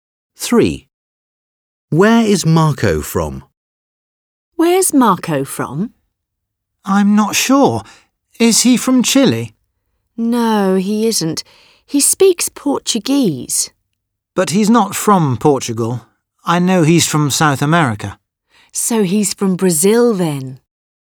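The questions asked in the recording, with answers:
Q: Where is Marco from?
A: Brazil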